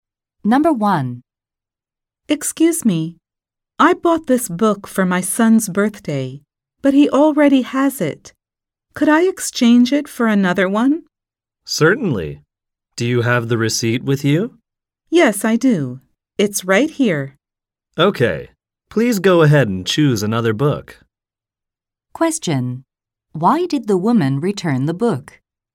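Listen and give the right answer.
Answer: Her son already has it.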